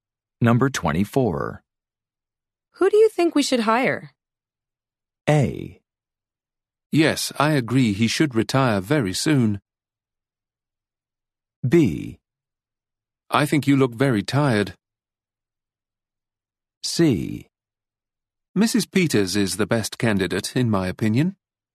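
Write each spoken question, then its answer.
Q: Who do you think we should hire?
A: C: Mrs. Peters is the best candidate, in my opinion.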